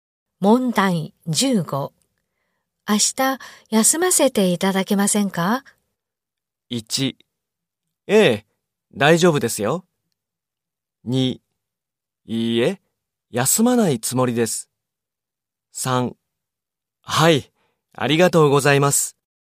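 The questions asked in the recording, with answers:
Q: 明日、休ませていただけませんか?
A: 3: ええ、大丈夫ですよ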